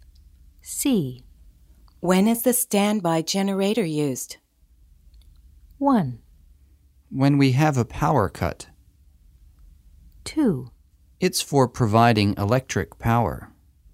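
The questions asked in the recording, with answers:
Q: When is the standby generator used?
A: 1: When we have a power cut.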